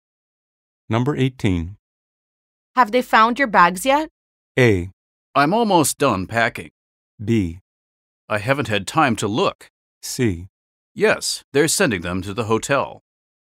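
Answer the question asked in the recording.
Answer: C: Yes, they're sending them to the hotel.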